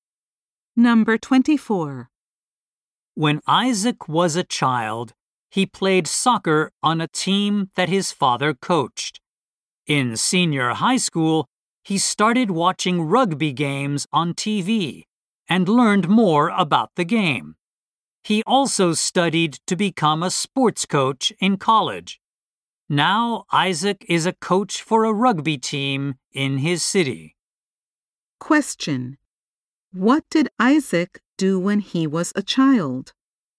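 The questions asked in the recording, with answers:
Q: What did Isaac do when he was a child?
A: He played soccer on a team his father coached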